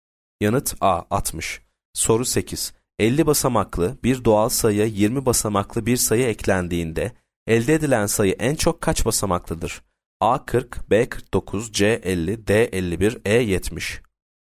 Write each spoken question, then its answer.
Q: 50 basamaklı bir doğal sayıya 20 basamaklı bir sayı eklendiğinde elde edilen sayı en çok kaç basamaklıdır?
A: Yanıt D 51.